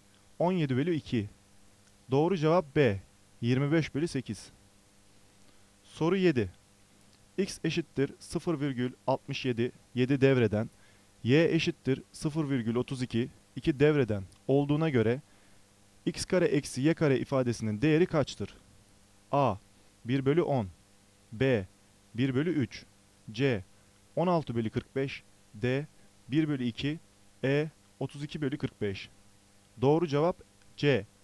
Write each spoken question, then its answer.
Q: X eşittir 0,67 7 devreden, Y eşittir 0,32 2 devreden olduğuna göre X kare eksi Y kare ifadesinin değeri kaçtır?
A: Doğru cevap C.